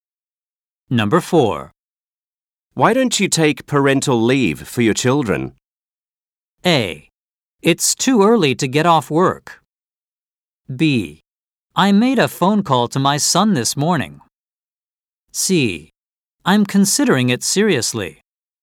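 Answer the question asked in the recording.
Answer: C: I'm considering it seriously.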